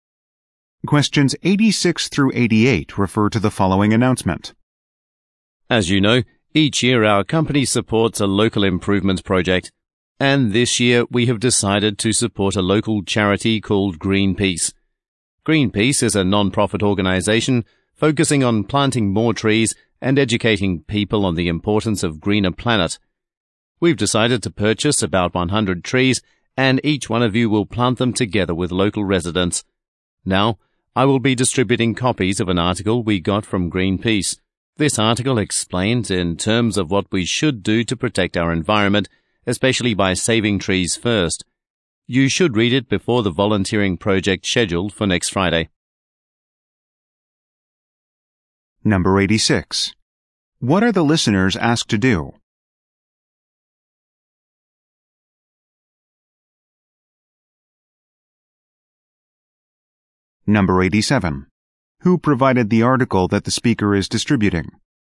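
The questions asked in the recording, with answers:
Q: What are the listeners asked to do?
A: Read the article before the volunteering project

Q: Who provided the article that the speaker is distributing?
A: Greenpeace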